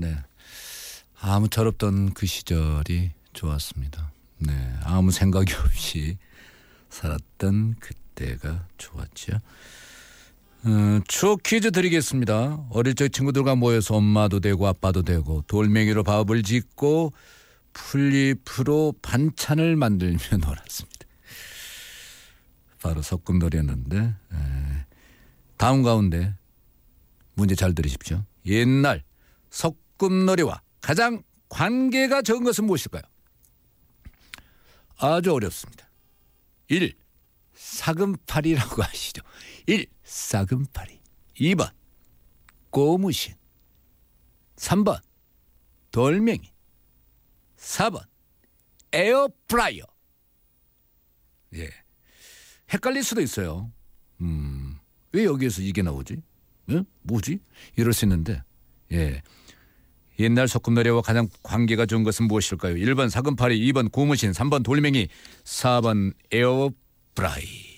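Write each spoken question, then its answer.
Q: 옛날 소꿉놀이와 가장 관계가 적은 것은 무엇일까요?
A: 4번: 에어프라이어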